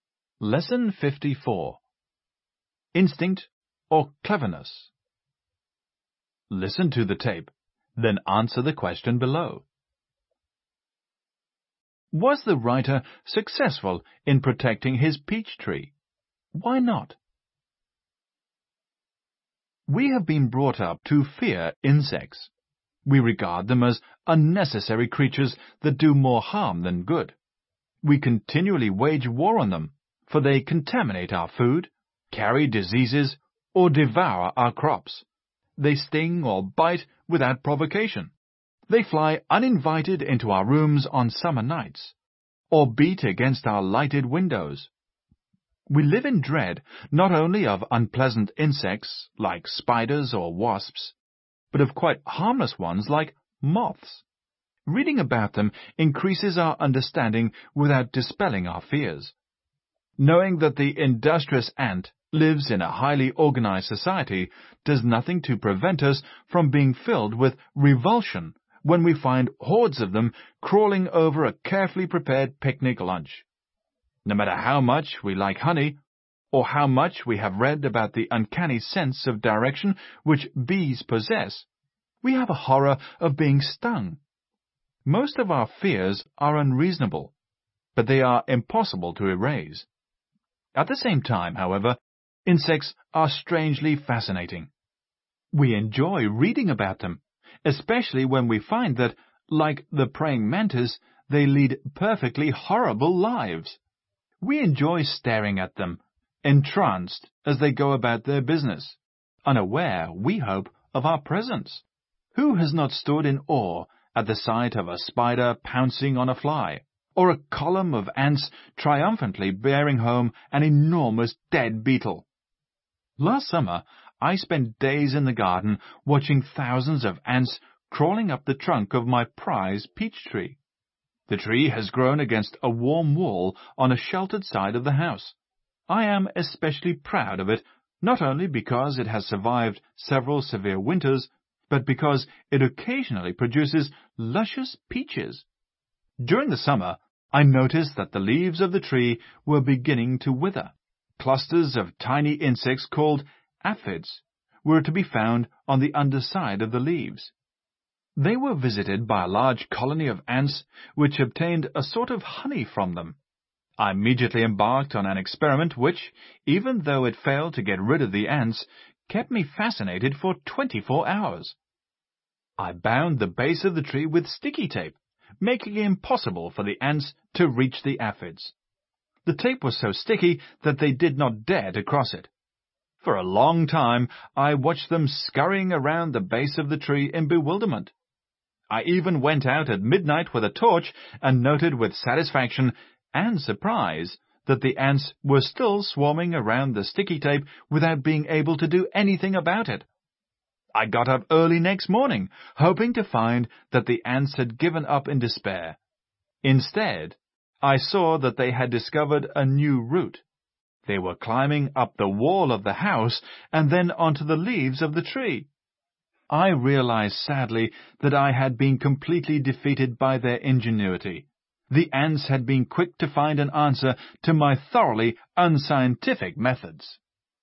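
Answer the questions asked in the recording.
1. No
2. The ants found a new route, climbing up the house wall onto the tree's leaves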